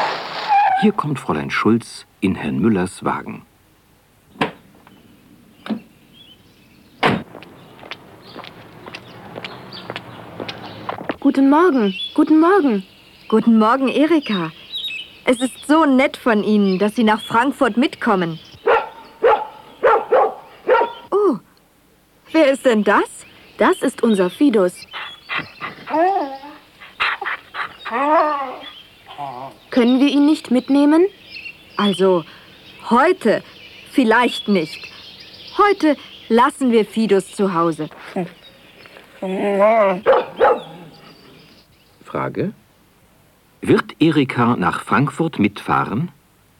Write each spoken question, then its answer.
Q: Wird Erika nach Frankfurt mitfahren?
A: Ja, sie wird mitfahren.